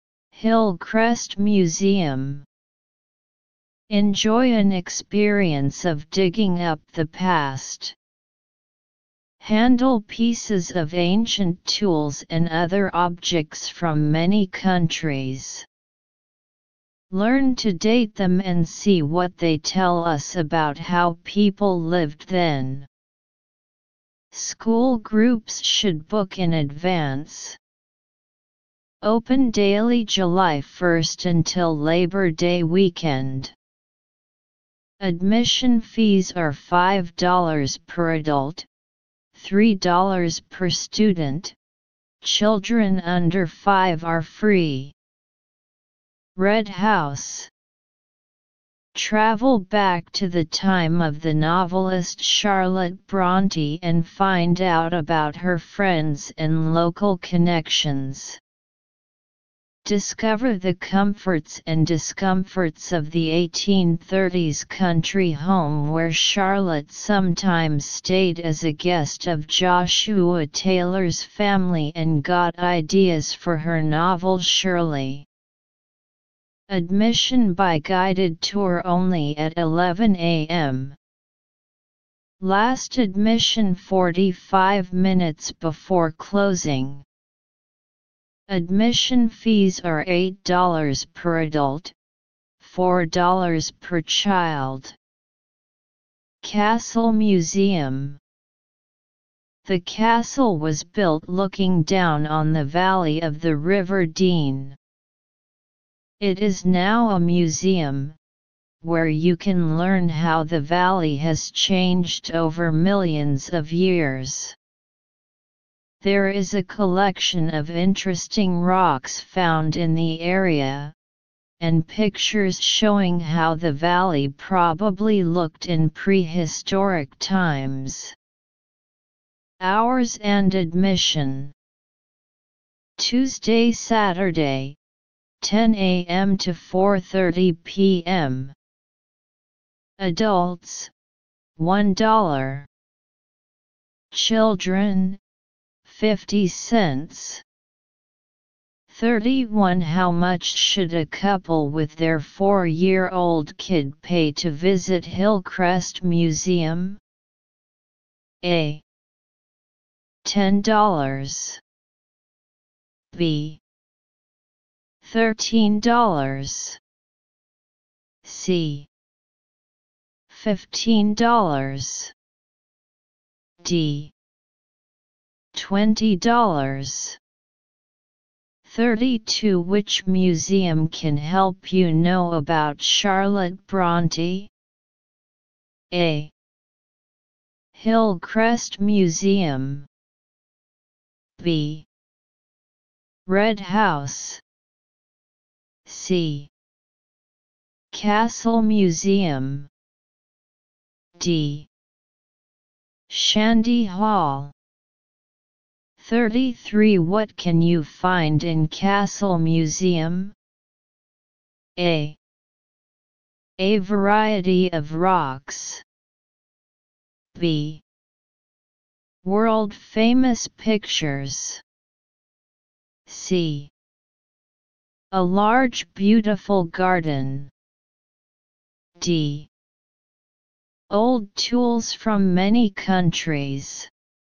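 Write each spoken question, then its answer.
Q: How much should a couple with their 4-year-old kid pay to visit Hillcrest Museum?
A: A: $10

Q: Which museum can help you know about Charlotte Bronte?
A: B: Red House

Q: What can you find in Castle Museum?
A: A: A variety of rocks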